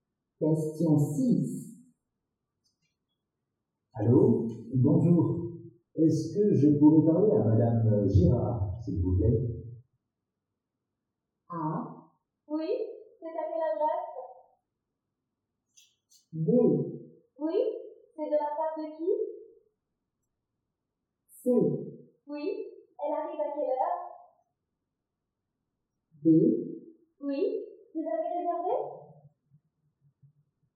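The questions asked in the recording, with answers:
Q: Allô, bonjour. Est-ce que je pourrais parler à Madame Girard, s'il vous plaît?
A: B: Oui, c'est de la part de qui?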